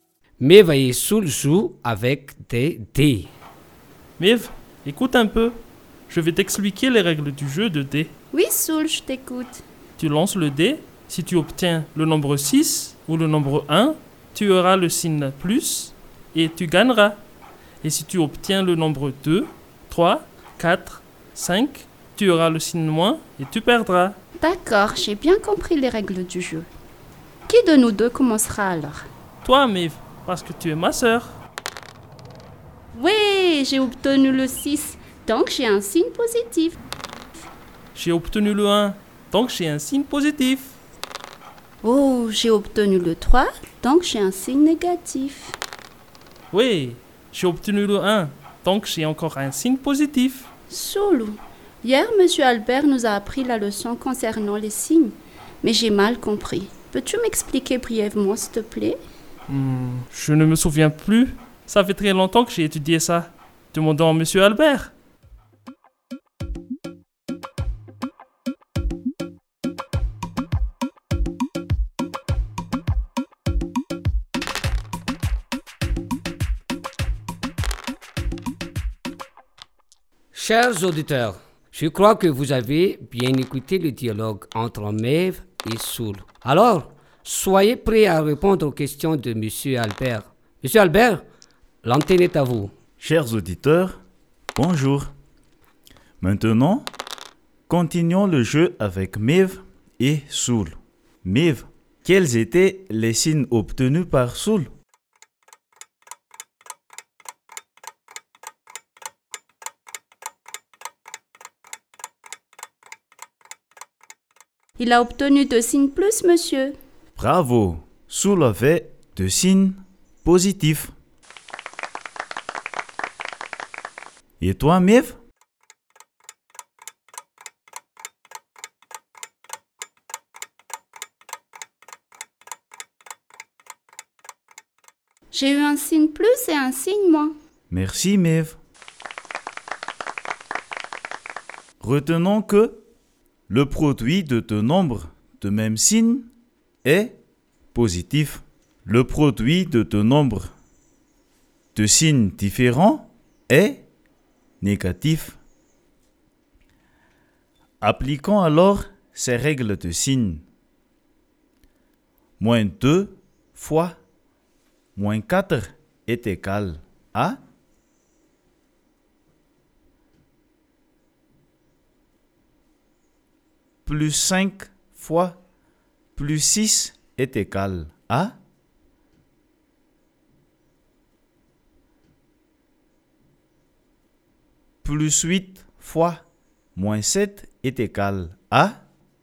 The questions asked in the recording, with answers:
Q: Moins 2 fois moins 4 est égal à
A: moins 2 fois moins 4 est égal à plus 8

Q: plus 5 fois plus 6 est égal à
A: Plus 5 fois plus 6 est égal à plus 30.

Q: plus 8 fois moins 7 est égal à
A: plus 8 fois moins 7 est égal à moins 56.